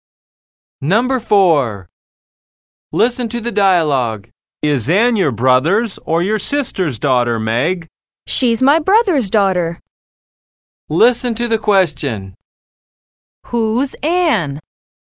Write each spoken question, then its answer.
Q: Who's Ann?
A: She's Meg's niece.